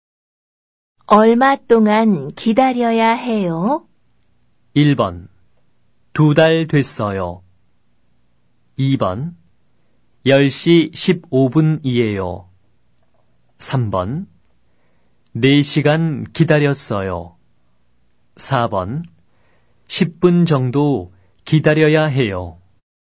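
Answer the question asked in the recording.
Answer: 4: 10분 정도 기다려야 해요.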